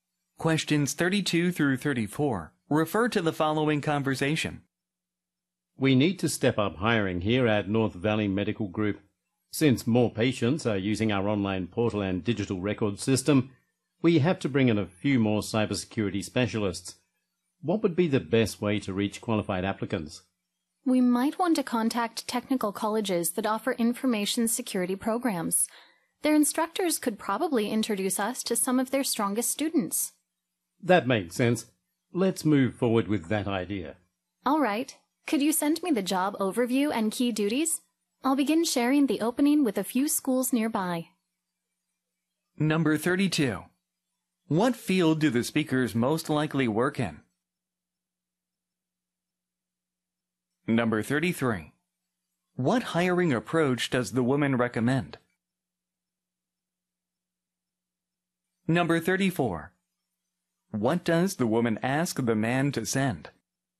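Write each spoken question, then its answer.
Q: What field do the speakers most likely work in?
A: 그래서 healthcare가 보기 중에 제일 가까운 답이죠.

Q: What hiring approach does the woman recommend?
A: Contacting technical colleges that offer information security programs

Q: What does the woman ask the man to send?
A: The job overview and key duties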